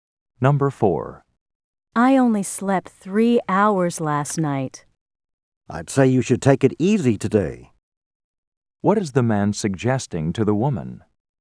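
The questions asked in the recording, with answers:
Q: What is the man suggesting to the woman?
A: She should rest and take it easy today.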